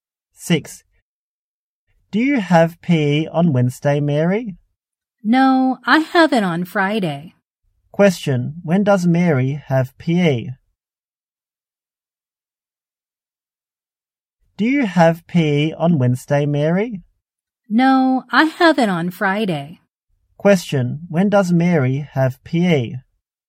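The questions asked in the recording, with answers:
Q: Question, when does Mary have PE?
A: On Friday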